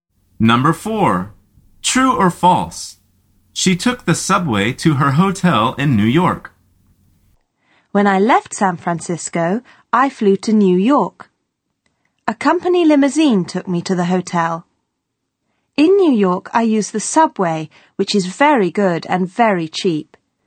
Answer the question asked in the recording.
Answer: The answer is false.